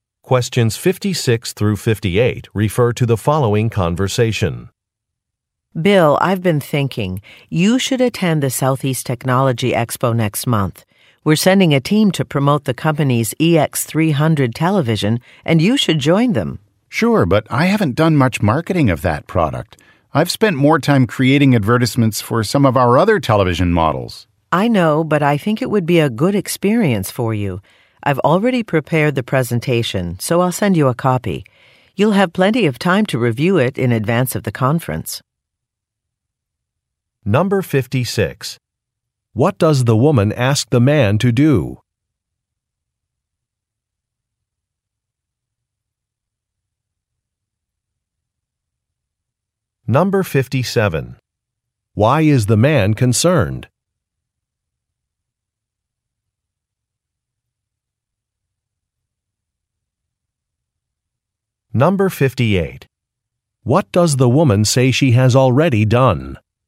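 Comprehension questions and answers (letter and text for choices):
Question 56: What does the woman ask the man to do?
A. Visit company headquarters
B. Participate in a conference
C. Complete a technical design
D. Submit a proposal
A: B. Participate in a conference

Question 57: Why is the man concerned?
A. He is not very familiar with a product.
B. He has not registered for a conference.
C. He has missed an important deadline.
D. He was planning to take a vacation.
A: A. He is not very familiar with a product.

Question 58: What does the woman say she has already done?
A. Provided feedback from a meeting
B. Designed a new product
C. Prepared a presentation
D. Made a hotel reservation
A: C. Prepared a presentation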